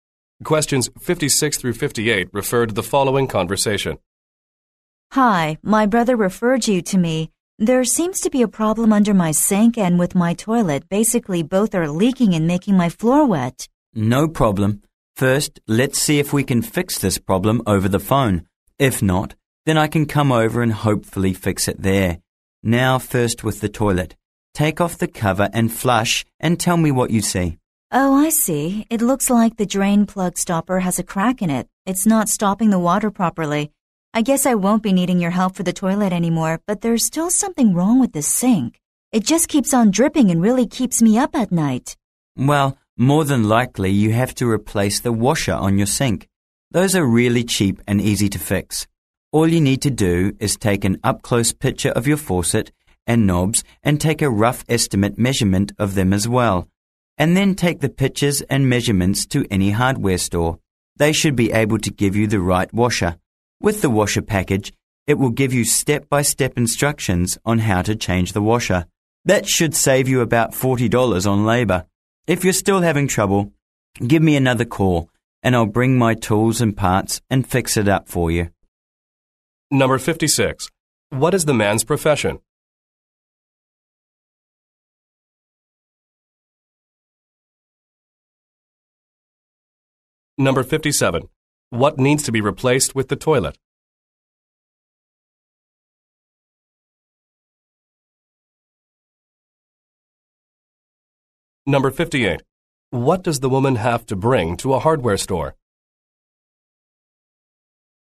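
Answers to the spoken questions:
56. Plumber
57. The drain plug stopper
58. Pictures and measurements of her faucet and knobs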